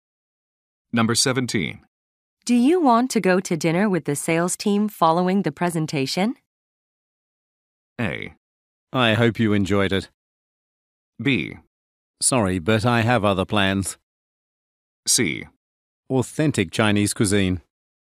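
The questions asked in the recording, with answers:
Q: Do you want to go to dinner with the sales team following the presentation?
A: B: Sorry, but I have other plans.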